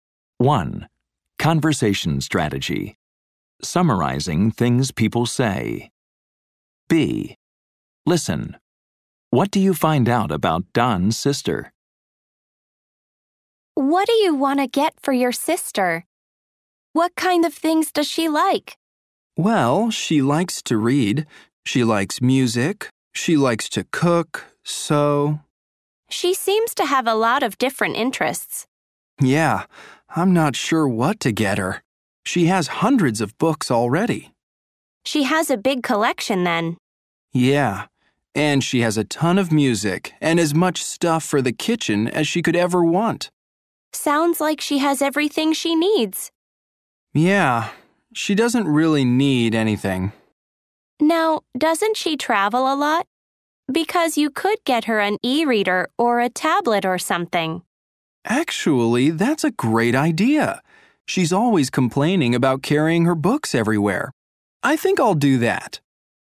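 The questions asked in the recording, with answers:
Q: What do you find out about Don's sister?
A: She likes to read, listen to music, cook and sew; she has hundreds of books and everything she needs, and she complains about carrying her books when she travels.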